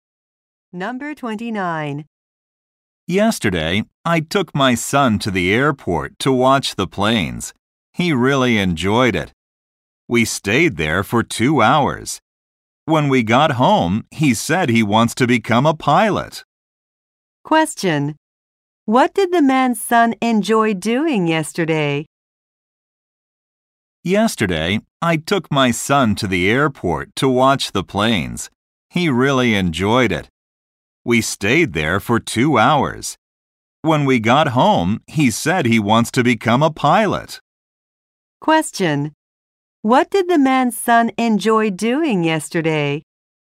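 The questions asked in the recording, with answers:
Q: What did the man's son enjoy doing yesterday?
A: Watching the planes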